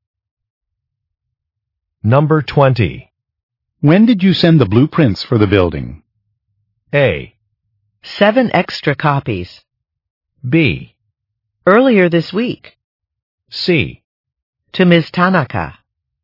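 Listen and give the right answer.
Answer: B: Earlier this week.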